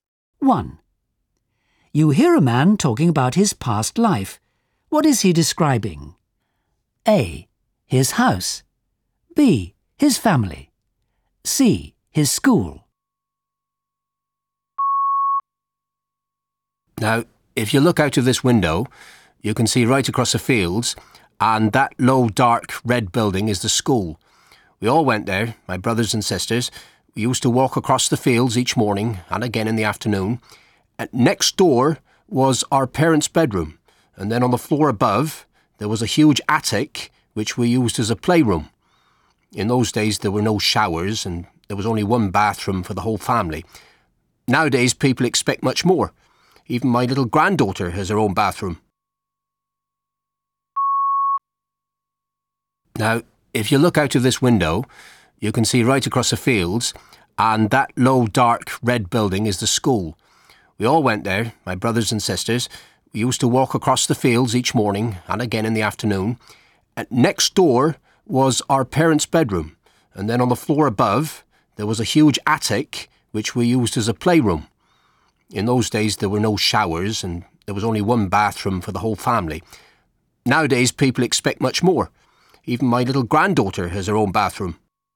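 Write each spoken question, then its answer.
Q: What is he describing? A. His house. B. His family. C. His school.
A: A: His house.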